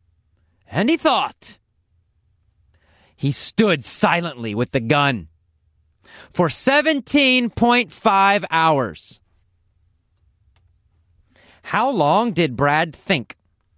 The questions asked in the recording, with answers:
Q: How long did Brad think?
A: He thought for 17.5 hours.